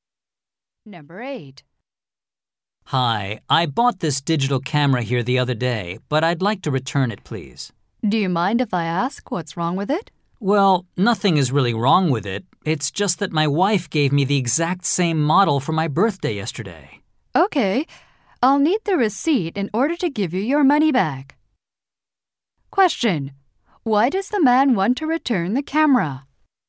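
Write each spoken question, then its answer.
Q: Why does the man want to return the camera?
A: His wife gave him the same model for his birthday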